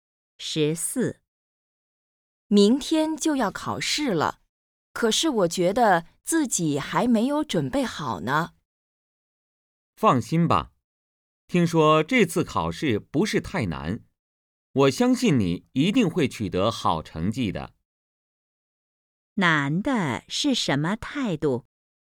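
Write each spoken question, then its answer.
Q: 难的是什么态度?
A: 相信对方能考好,鼓励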